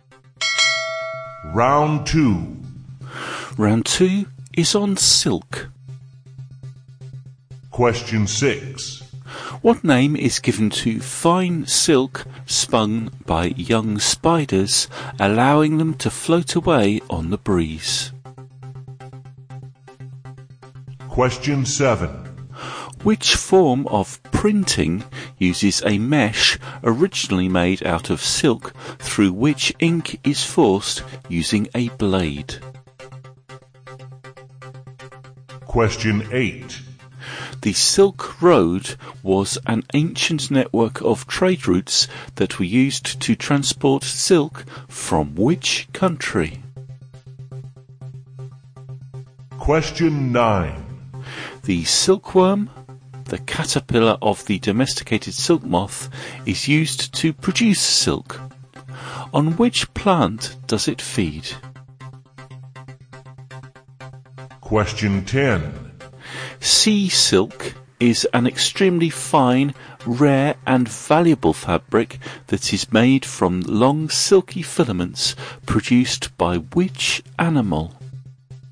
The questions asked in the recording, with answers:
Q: What name is given to fine silk spun by young spiders, allowing them to float away on the breeze?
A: fine silk spun by young spiders, is called gossamer.

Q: Which form of printing uses a mesh originally made out of silk through which ink is forced using a blade?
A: that form of printing that used silk was silk screen or screen printing.

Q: The Silk Road was an ancient network of trade routes that were used to transport silk from which country?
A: the Silk Road was used to transport silk from China.

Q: On which plant does it feed?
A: the silkworm feeds on white mulberry.

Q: Sea silk is an extremely fine, rare and valuable fabric that is made from long silky filaments produced by which animal?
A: sea silk is a product of the noble pen shell or fan muscle.